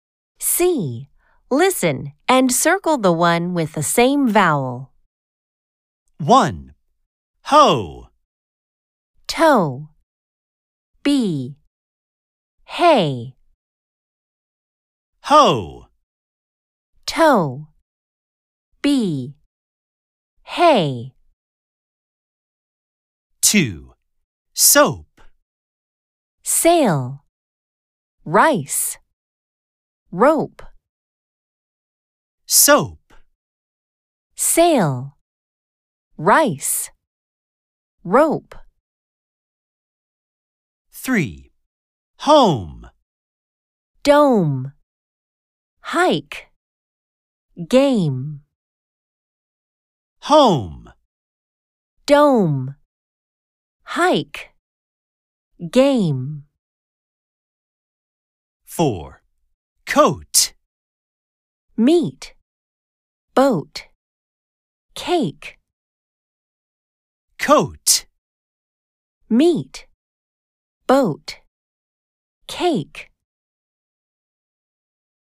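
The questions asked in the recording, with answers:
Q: Soap.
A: C: Rope

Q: Home.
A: A: Dome

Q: Coat.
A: B: Boat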